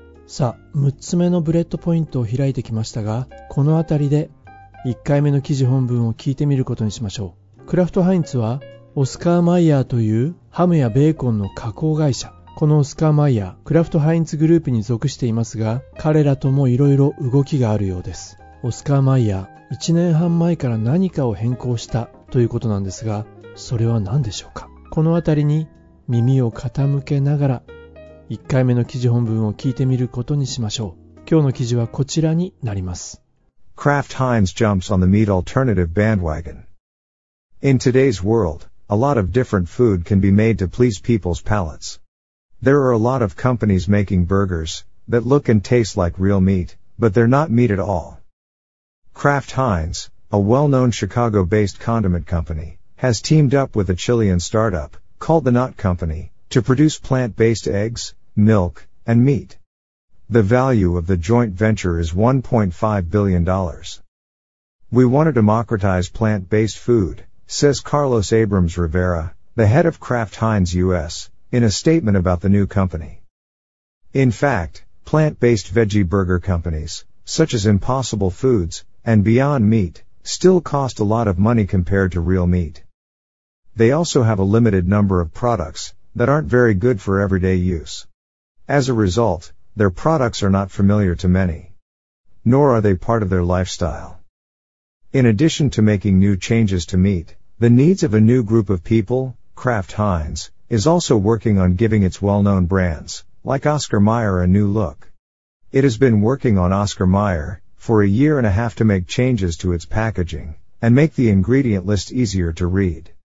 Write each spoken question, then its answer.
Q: オスカーマイヤー、1年半前から何かを変更したということなんですが、それは何でしょうか。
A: パッケージの変更ですね。